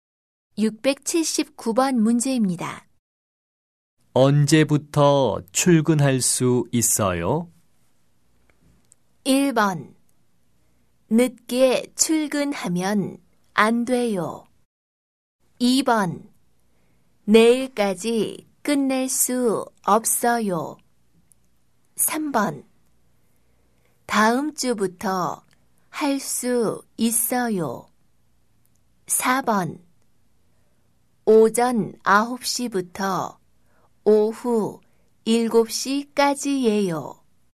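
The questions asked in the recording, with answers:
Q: 언제부터 출근할 수 있어요?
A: 3: 다음 주부터 할 수 있어요.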